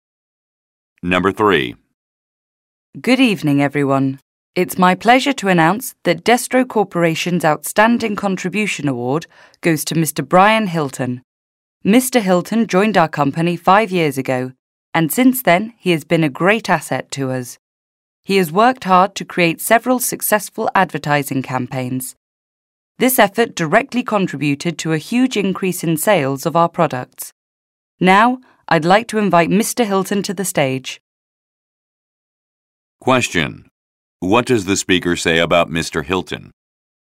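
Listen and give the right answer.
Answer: He created several successful advertising campaigns that greatly increased sales.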